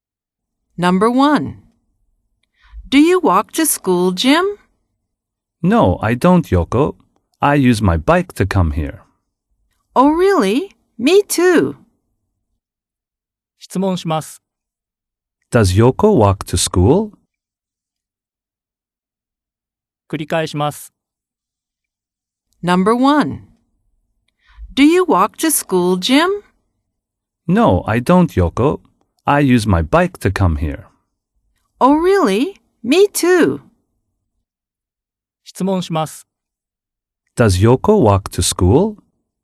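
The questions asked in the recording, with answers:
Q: Does Yoko walk to school?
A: No, she doesn't. She uses her bike.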